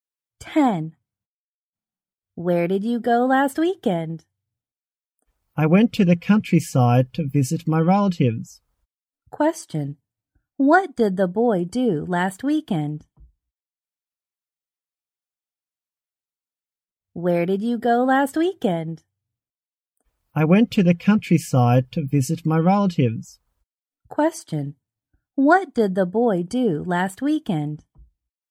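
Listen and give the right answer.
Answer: He visited his relatives in the countryside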